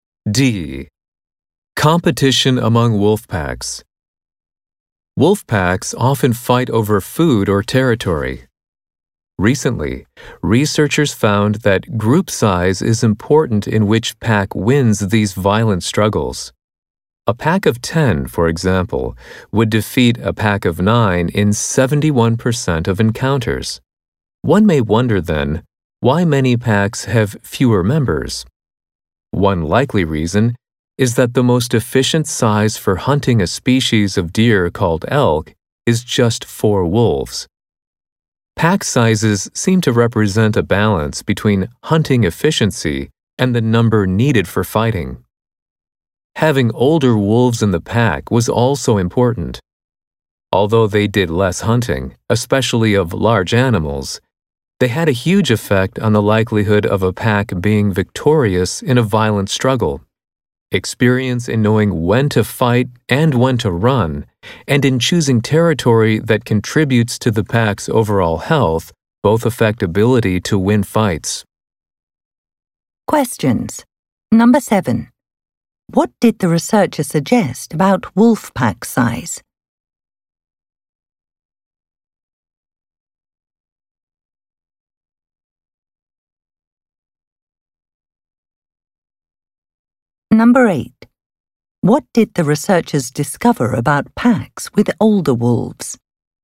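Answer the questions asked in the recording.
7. It reflects a balance between hunting efficiency and the number of wolves needed for fighting
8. They were more likely to win violent fights with other packs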